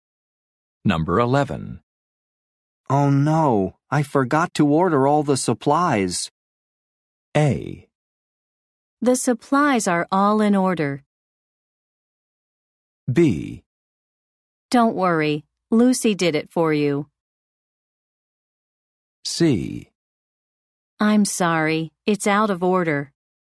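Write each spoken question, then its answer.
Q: Oh no, I forgot to order all the supplies.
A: B: Don't worry, Lucy did it for you.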